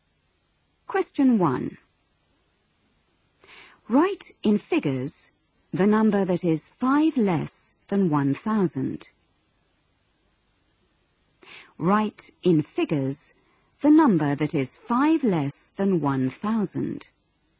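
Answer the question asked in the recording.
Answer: 995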